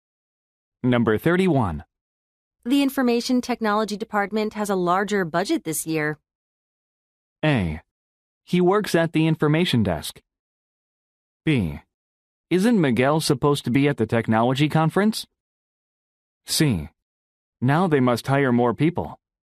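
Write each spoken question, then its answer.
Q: The Information Technology Department has a larger budget this year.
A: C: Now they must hire more people.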